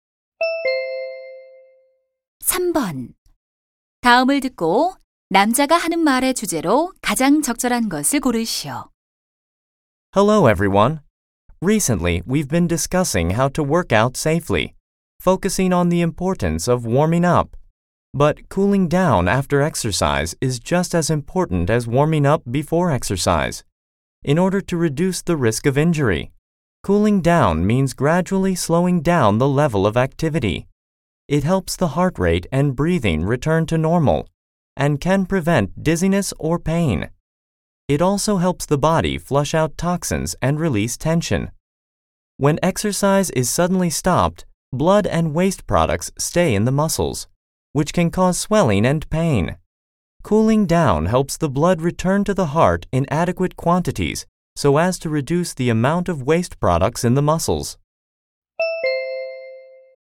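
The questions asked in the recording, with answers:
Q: 다음을 듣고 남자가 하는 말의 주제로 가장 적절한 것을 고르시오.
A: 운동 후 정리 운동의 중요성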